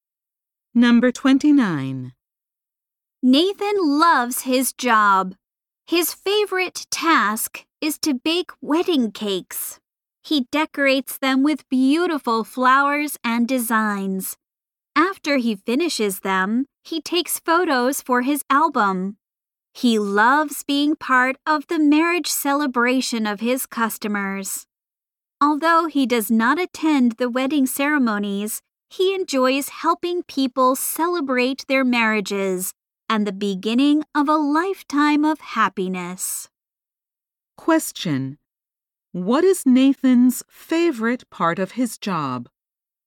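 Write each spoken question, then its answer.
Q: What is Nathan's favorite part of his job?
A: Baking wedding cakes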